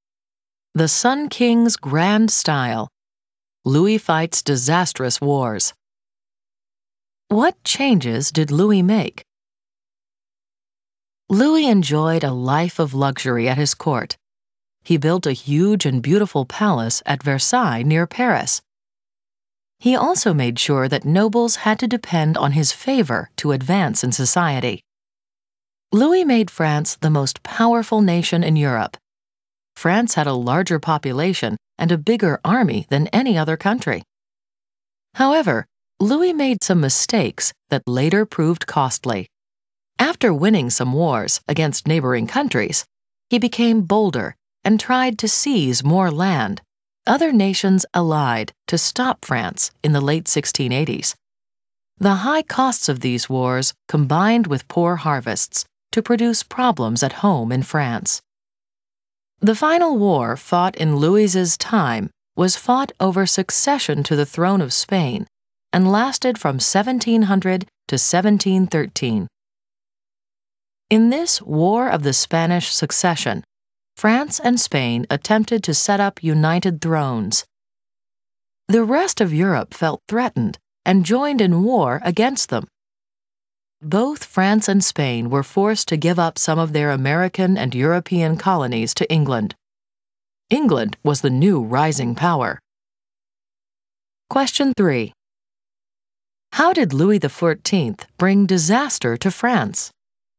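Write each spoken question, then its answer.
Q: How did Louis XIV bring disaster to France?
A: His costly wars, together with poor harvests, caused problems at home, and France lost colonies in the War of the Spanish Succession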